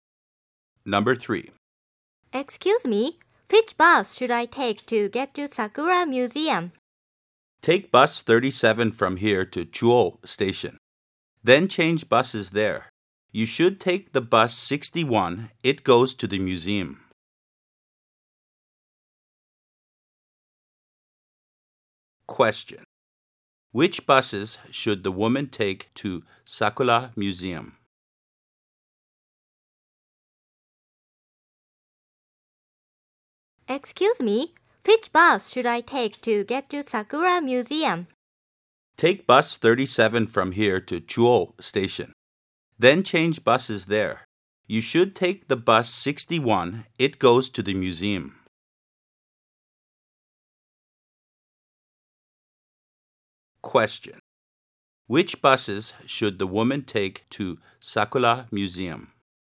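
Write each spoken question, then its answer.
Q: Which buses should the woman take to Sakura Museum?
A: Bus 37 to Chuo Station, then bus 61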